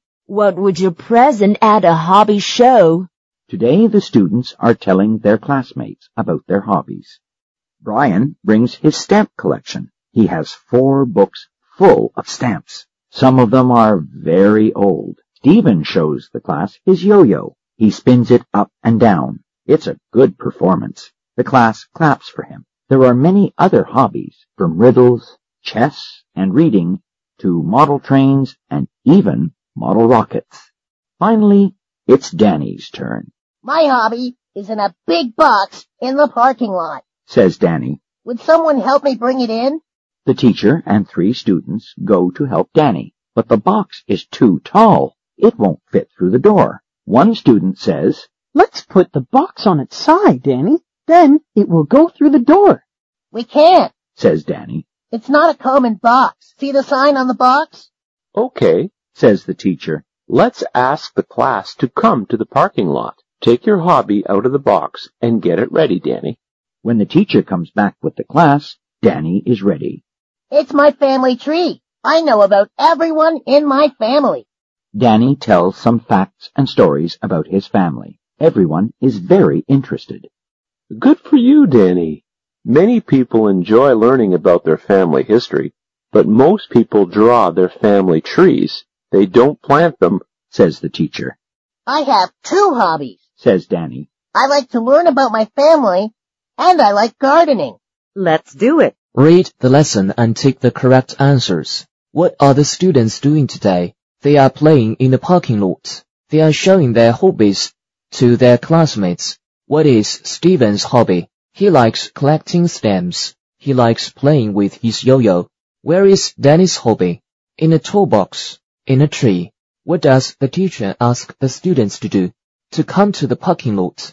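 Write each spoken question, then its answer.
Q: What are the students doing today?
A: They are showing their hobbies to their classmates.

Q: What is Stephen's hobby?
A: He likes playing with his yo-yo.

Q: What does the teacher ask the students to do?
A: To come to the parking lot.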